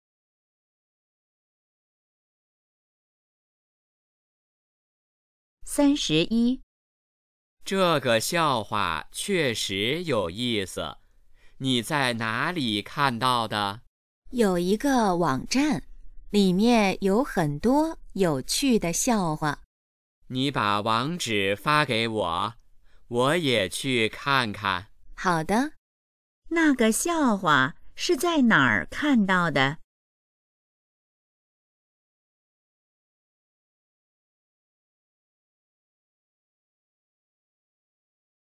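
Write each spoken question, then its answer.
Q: 那个笑话是在哪儿看到的?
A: 一个网站上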